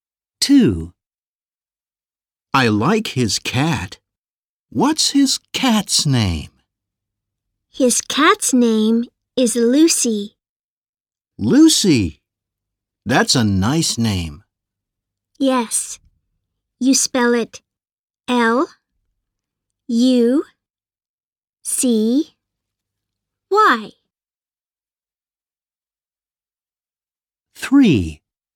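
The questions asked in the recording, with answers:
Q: I like his cat. What's his cat's name?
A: Lucy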